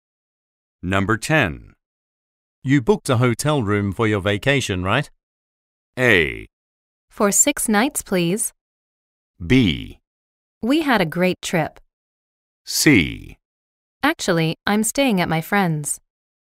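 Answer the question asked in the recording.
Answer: C: Actually, I'm staying at my friend's.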